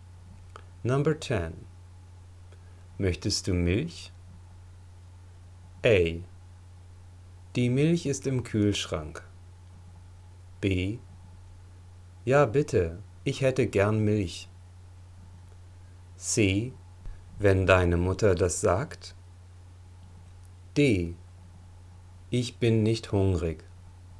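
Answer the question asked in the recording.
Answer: B: Ja, bitte, ich hätte gern Milch.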